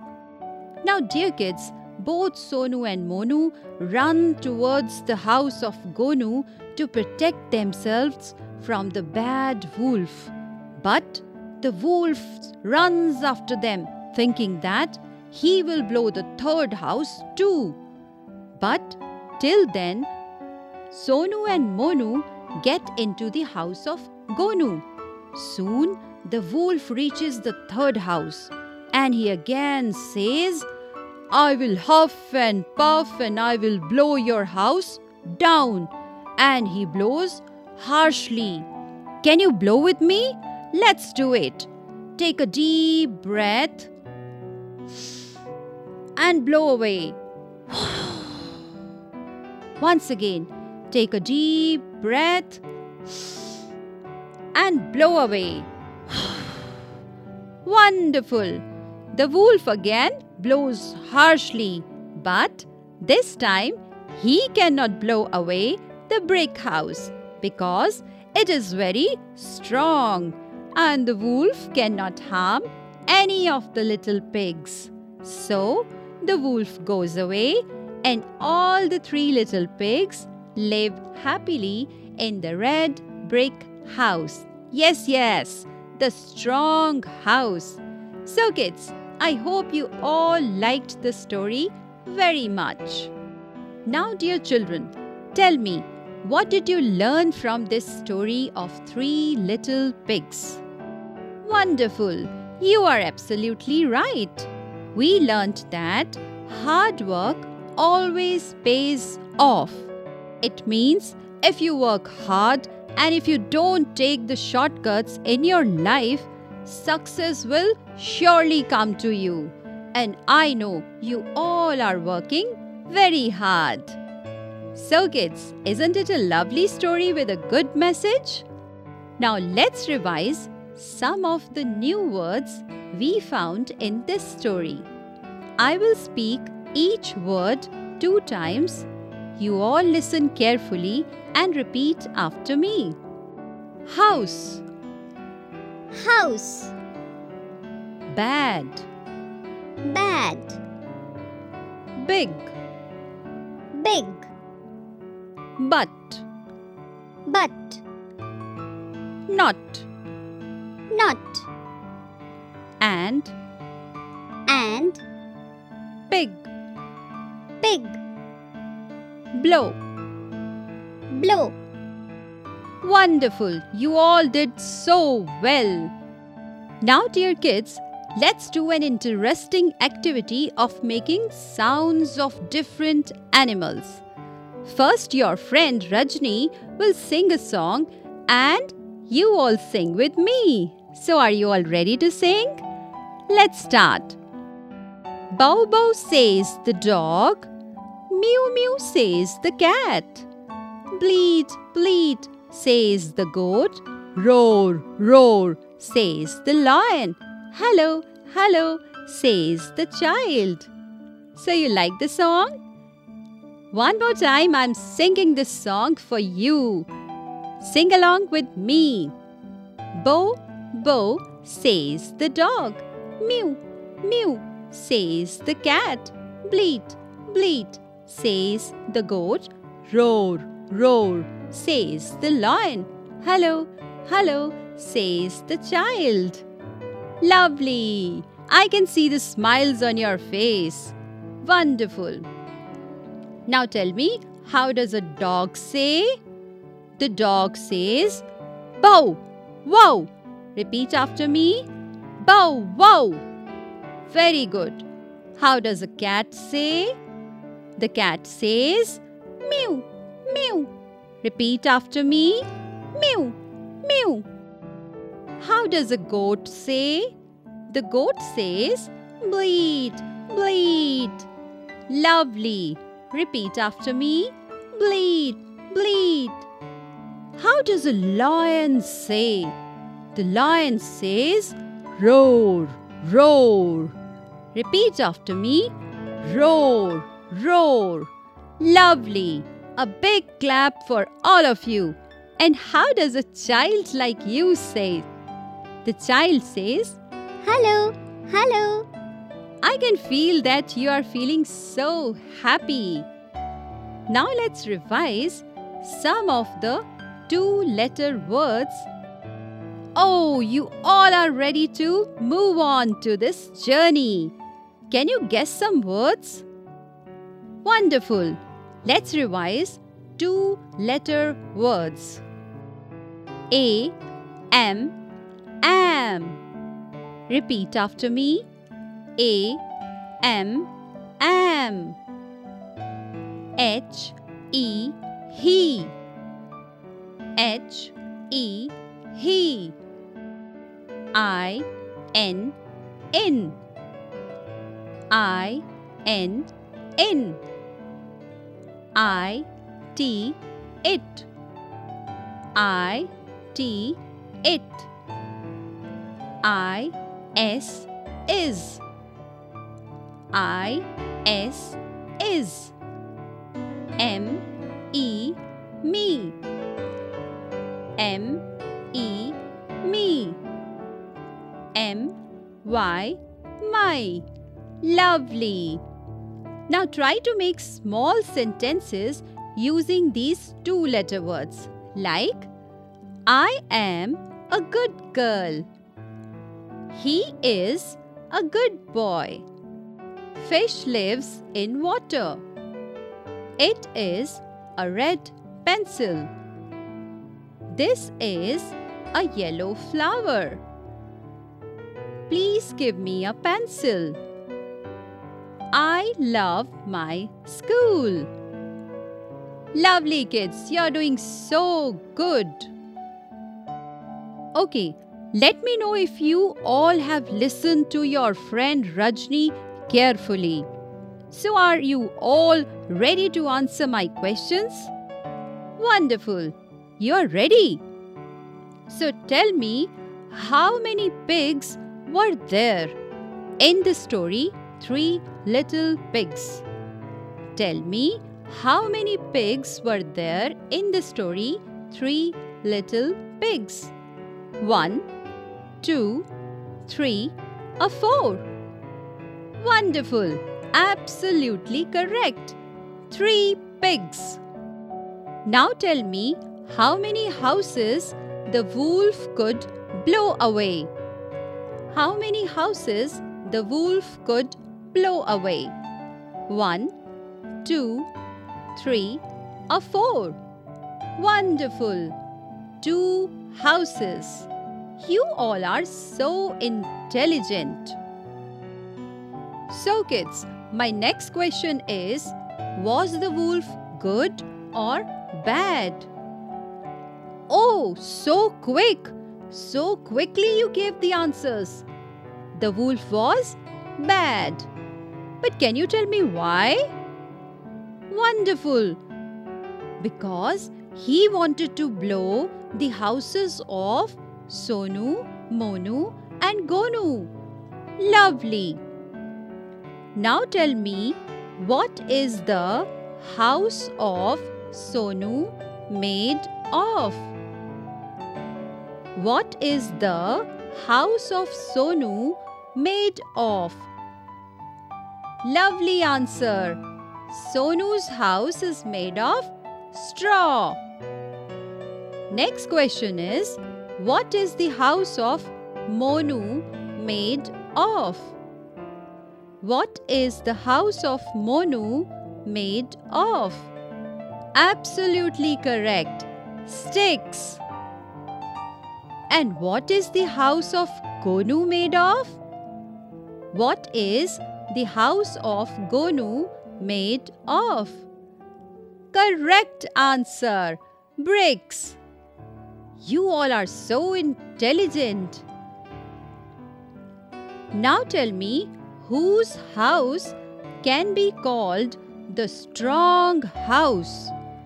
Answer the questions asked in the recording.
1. Two houses.
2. The wolf was bad.
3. Sonu's house is made of straw.
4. Sticks.
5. Bricks.
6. Gonu's house.